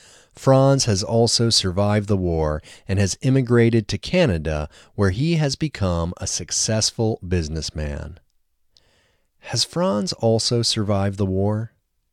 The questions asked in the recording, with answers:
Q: Has Franz also survived the war?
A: Yes, Franz has also survived the war.